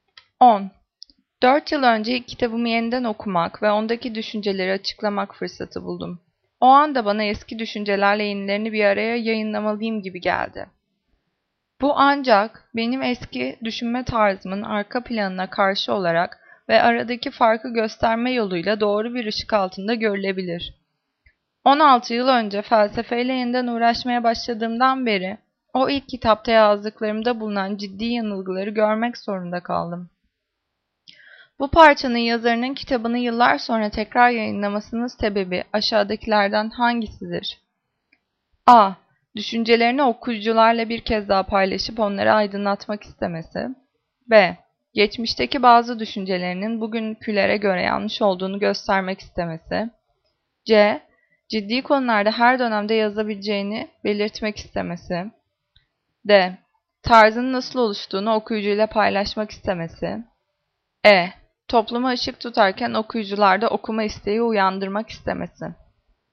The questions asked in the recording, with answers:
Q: Bu parçanın yazarının kitabını yıllar sonra tekrar yayınlamasının sebebi aşağıdakilerden hangisidir?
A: Cevap B. Geçmişteki bazı düşüncelerinin bugünkülere göre yanlış olduğunu göstermek istemesi.